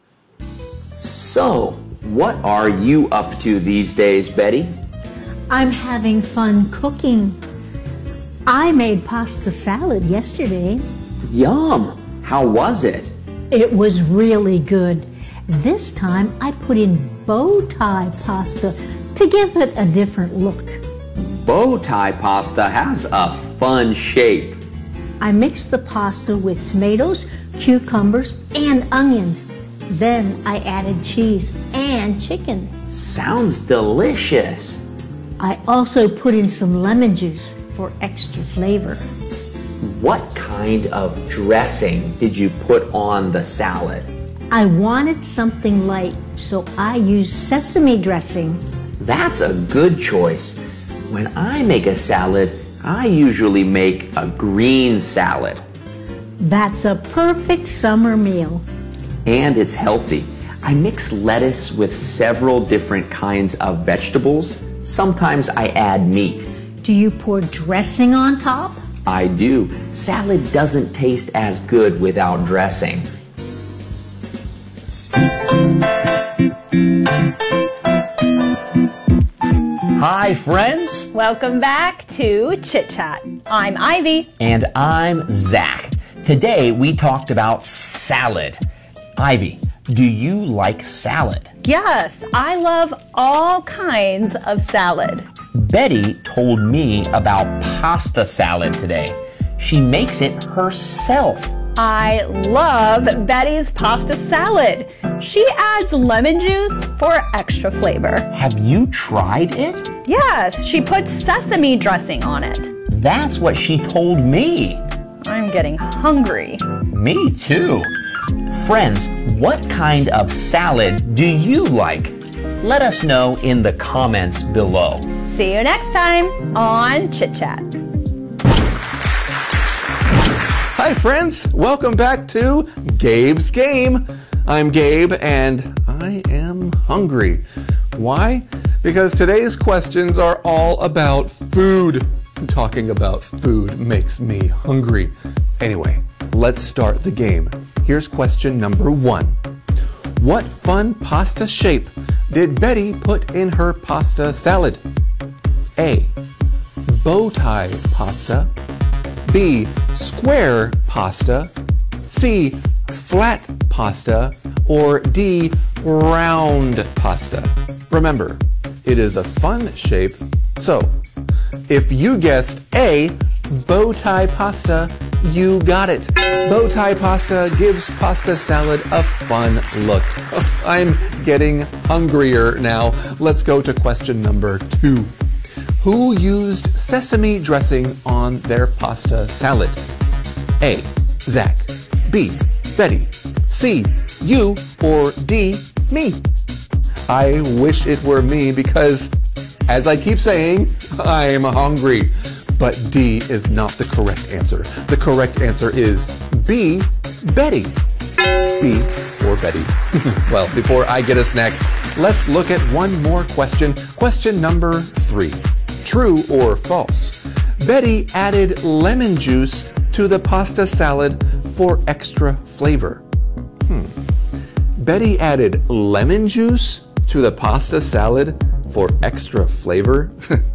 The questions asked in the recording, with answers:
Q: What fun pasta shape did Betty put in her pasta salad?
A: So, if you guessed A, bow tie pasta, you got it.

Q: Who used sesame dressing on their pasta salad?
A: The correct answer is B, Betty.

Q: Betty added lemon juice to the pasta salad for extra flavor.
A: Well, did you say true?